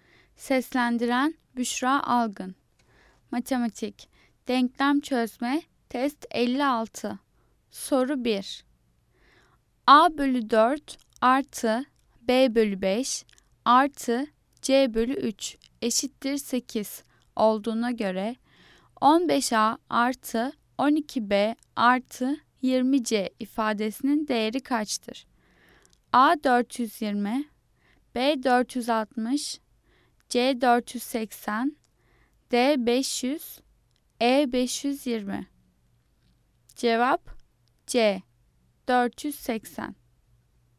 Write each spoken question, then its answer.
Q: A bölü 4 artı B bölü 5 artı C bölü 3 eşittir 8 olduğuna göre 15A artı 12B artı 20C ifadesinin değeri kaçtır?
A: Cevap C 480.